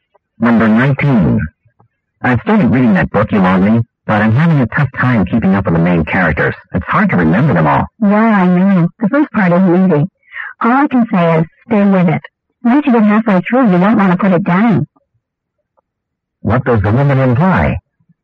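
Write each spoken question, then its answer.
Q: What does the woman imply?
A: The book gets much better later on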